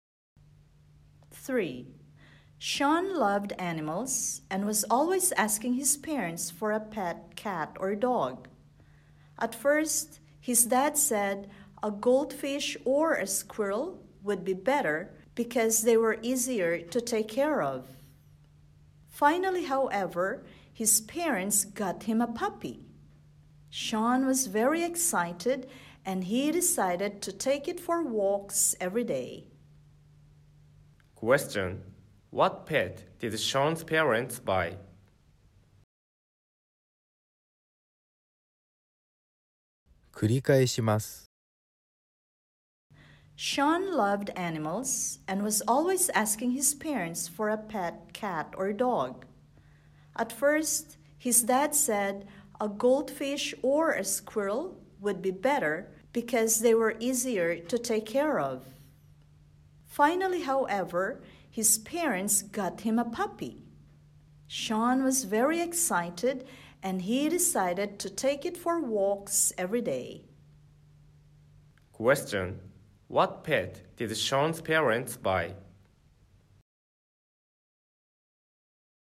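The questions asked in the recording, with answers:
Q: Question.What pet did Sean's parents buy?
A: A puppy.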